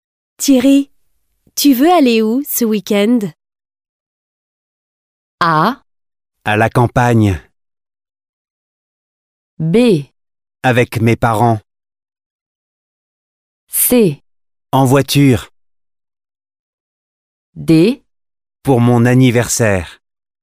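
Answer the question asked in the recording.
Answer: A: À la campagne.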